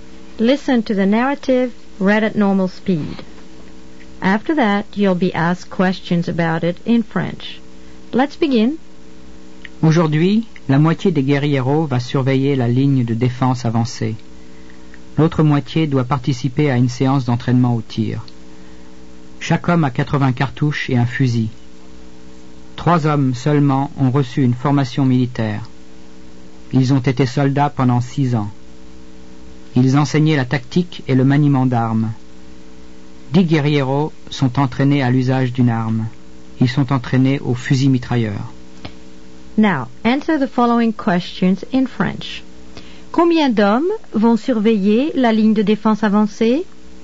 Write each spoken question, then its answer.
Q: Combien d'hommes vont surveiller la ligne de défense avancée?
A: La moitié des hommes va surveiller la ligne de défense avancée.